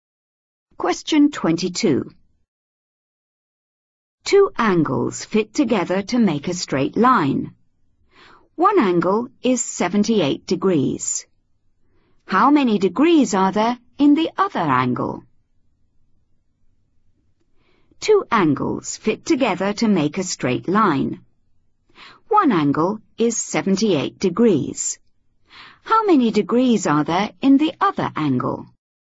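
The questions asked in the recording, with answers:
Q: How many degrees are there in the other angle?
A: 102 degrees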